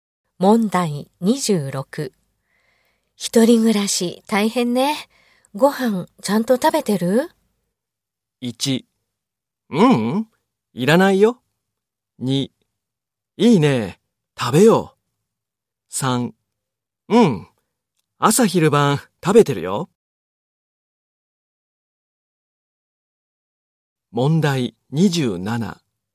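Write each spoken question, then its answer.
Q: 一人暮らし大変ね。ご飯ちゃんと食べてる?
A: 2: うん、朝昼晩食べてるよ。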